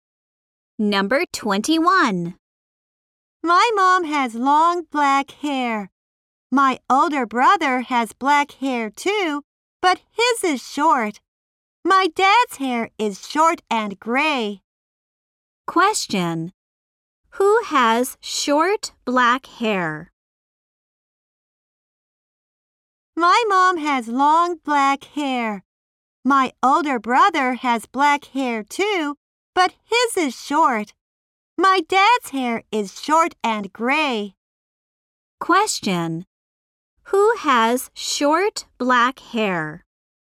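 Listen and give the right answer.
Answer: The speaker's older brother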